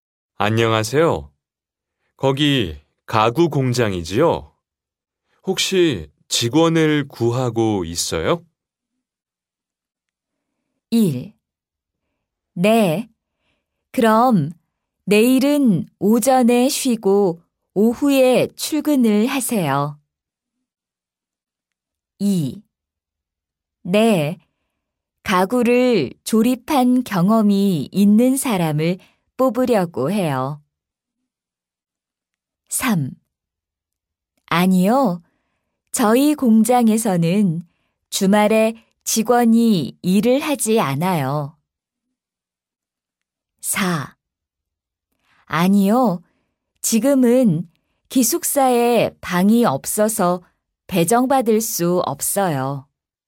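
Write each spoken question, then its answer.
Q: 안녕하세요. 거기 가구 공장이지요? 혹시 직원을 구하고 있어요?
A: 2: 네. 가구를 조립한 경험이 있는 사람을 뽑으려고 해요.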